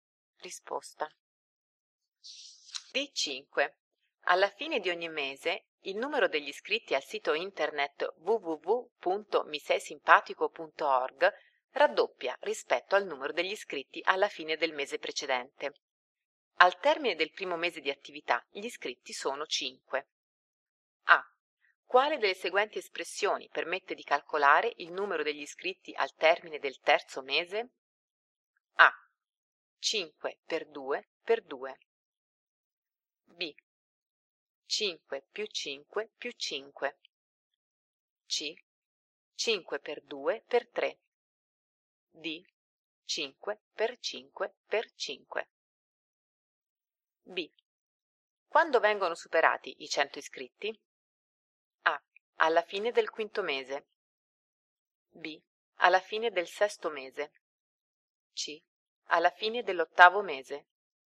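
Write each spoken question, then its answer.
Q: Quale delle seguenti espressioni permette di calcolare il numero degli iscritti al termine del terzo mese?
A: A: 5 per 2 per 2

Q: Quando vengono superati i 100 iscritti?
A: B: Alla fine del sesto mese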